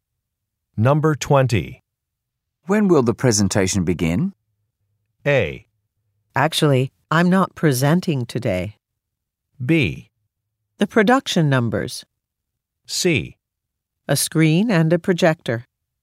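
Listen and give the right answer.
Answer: A: Actually, I'm not presenting today.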